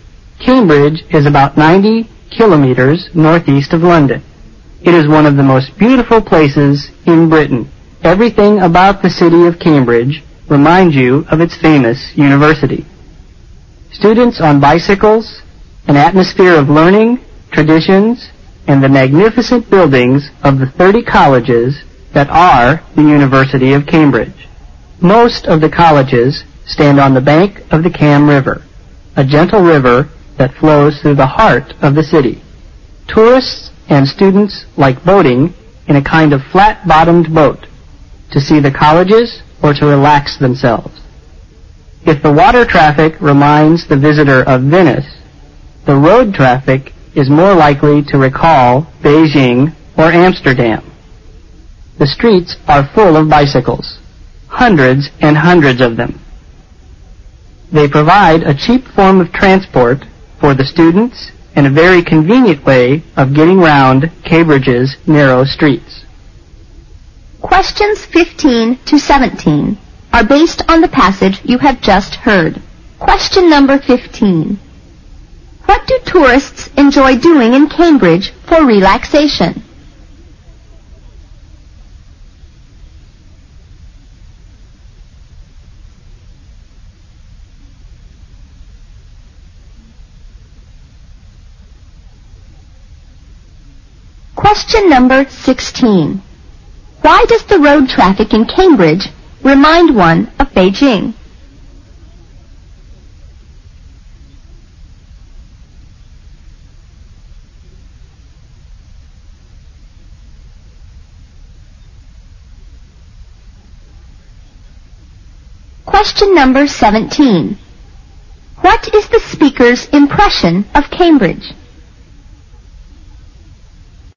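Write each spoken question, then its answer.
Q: What do tourists enjoy doing in Cambridge for relaxation?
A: Boating in a flat-bottomed boat on the Cam River

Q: Why does the road traffic in Cambridge remind one of Beijing?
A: The streets are full of bicycles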